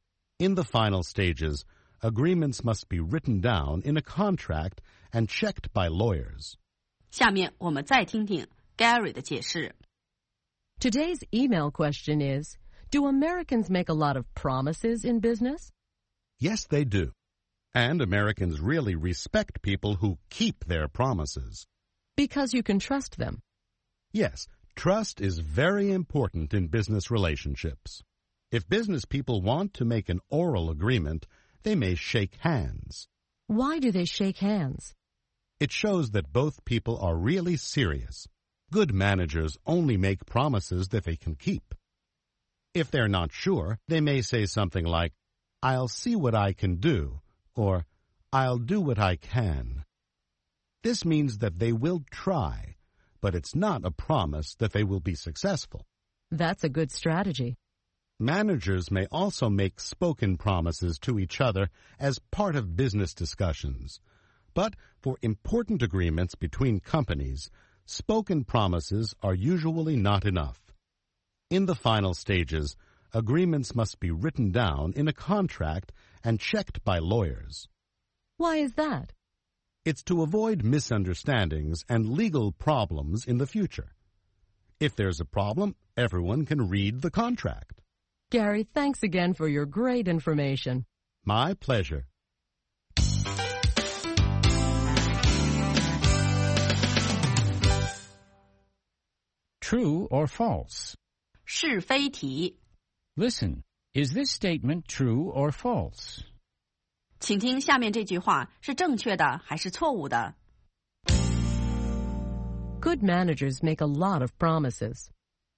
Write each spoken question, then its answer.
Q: Good managers make a lot of promises.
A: False. Good managers only make promises that they can keep.